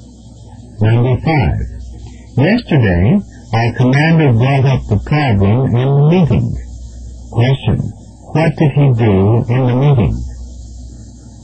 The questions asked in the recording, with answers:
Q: What did he do in the meeting?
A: We introduced the problem.